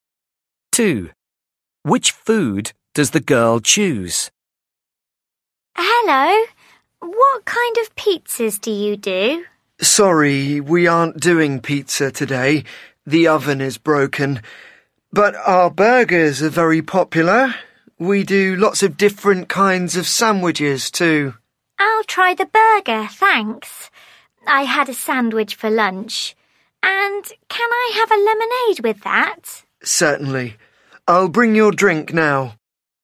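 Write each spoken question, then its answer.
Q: Which food does the girl choose?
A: a burger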